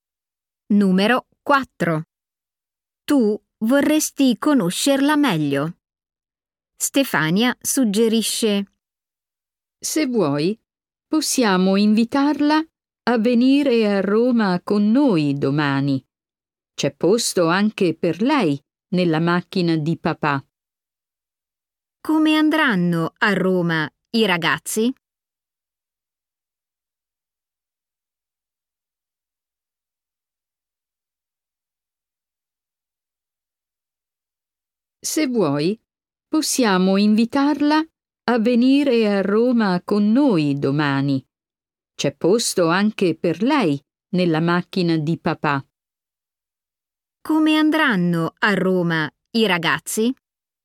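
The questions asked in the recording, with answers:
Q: Come andranno a Roma i ragazzi?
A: in macchina (del papà di Stefania)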